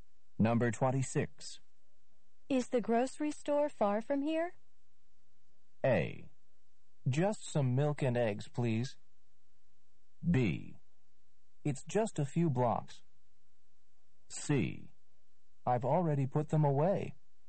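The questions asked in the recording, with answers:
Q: Is the grocery store far from here?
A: B: It's just a few blocks.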